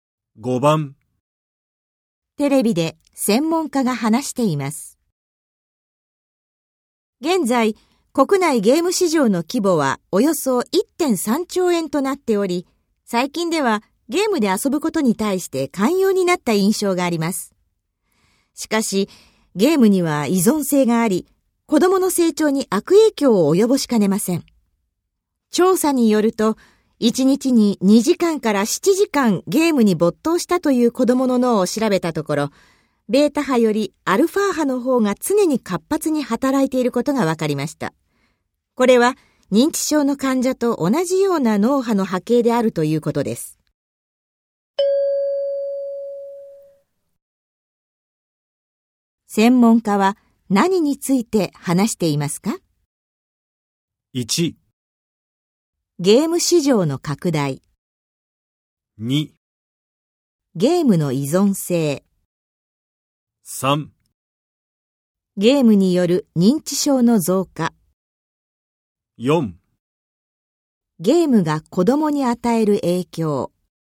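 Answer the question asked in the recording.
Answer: 4: ゲームが子供に与える影響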